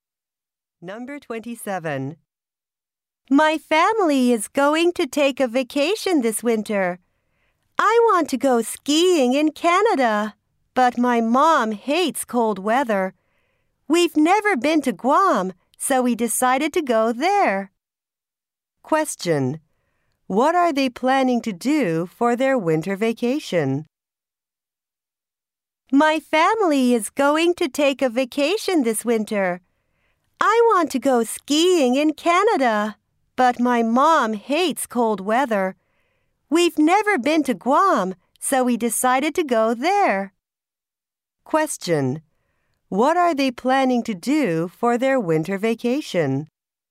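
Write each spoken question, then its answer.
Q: What are they planning to do for their winter vacation?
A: Go to Guam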